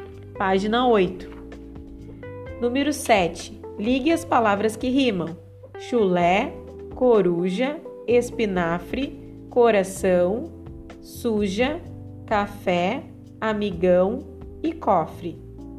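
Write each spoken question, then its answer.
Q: Ligue as palavras que rimam: chulé, coruja, espinafre, coração, suja, café, amigão e cofre.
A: chulé-café, coruja-suja, espinafre-cofre, coração-amigão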